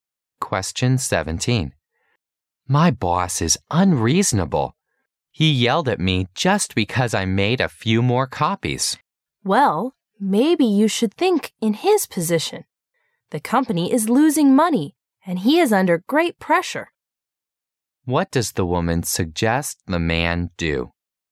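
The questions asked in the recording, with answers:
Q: What does the woman suggest the man do?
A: Think about the situation from his boss's position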